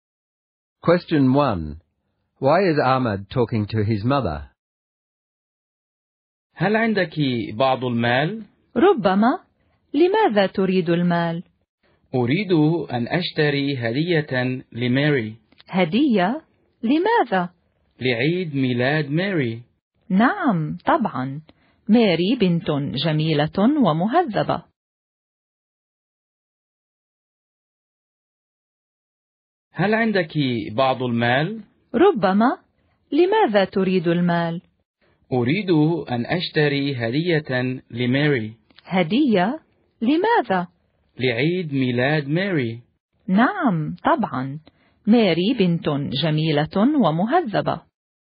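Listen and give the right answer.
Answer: He wants some money to buy a birthday present for Mary.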